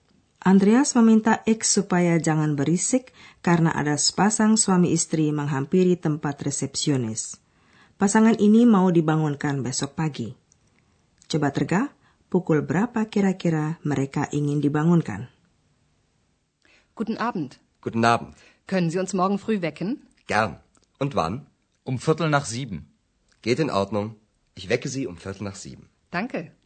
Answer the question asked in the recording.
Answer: Pasangan ini ingin dibangunkan kira-kira pukul tujuh.